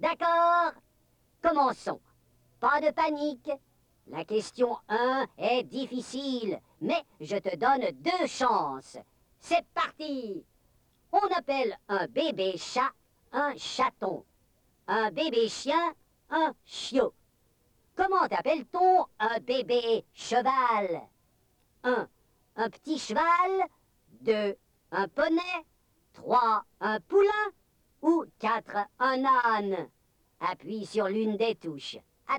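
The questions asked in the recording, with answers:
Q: Comment appelle-t-on un bébé cheval?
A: 3: Un poulain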